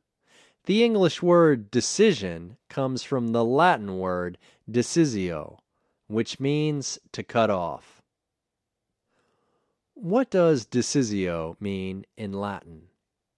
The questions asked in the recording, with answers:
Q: What does decisio mean in Latin?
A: Decisio means to cut off in Latin.